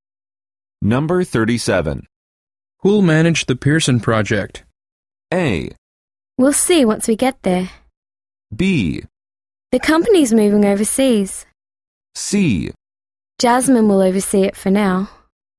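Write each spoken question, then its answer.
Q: Who'll manage the Pearson project?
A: C: Jasmine will oversee it for now.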